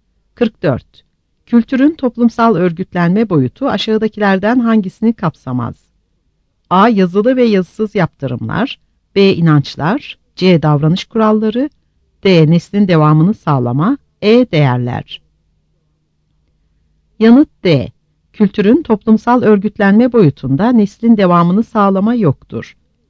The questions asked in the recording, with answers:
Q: Kültürün toplumsal örgütlenme boyutu aşağıdakilerden hangisini kapsamaz?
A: Yanıt D.